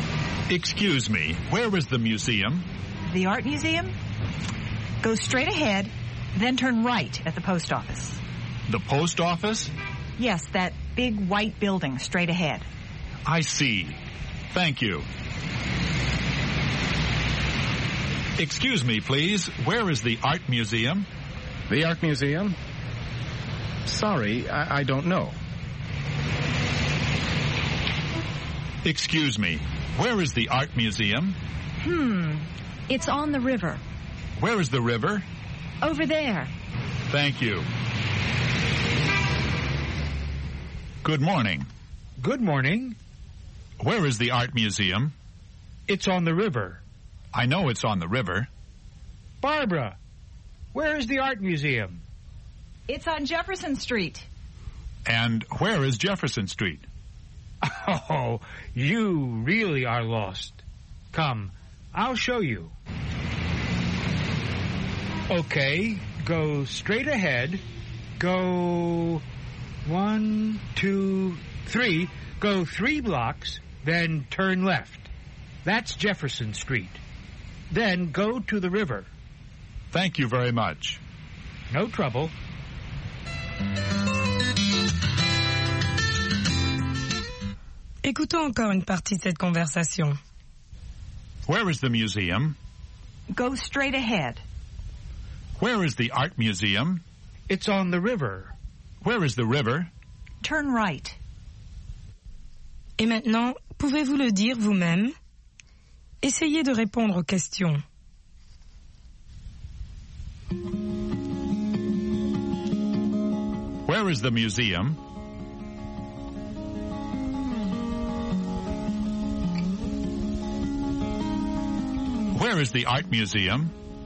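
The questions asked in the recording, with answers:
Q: Where is the museum?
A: Go straight ahead, then turn right at the post office.

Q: Where is the art museum?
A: It's on the river.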